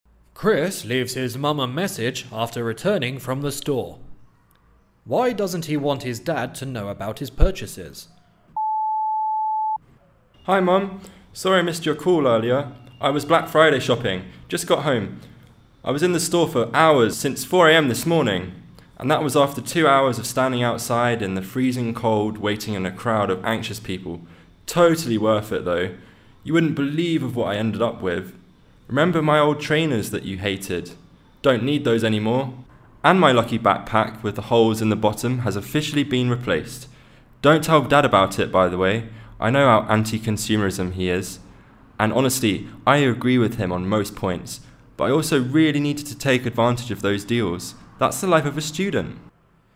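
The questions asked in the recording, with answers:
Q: Why doesn't he want his dad to know about his purchases?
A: Because his dad is against consumerism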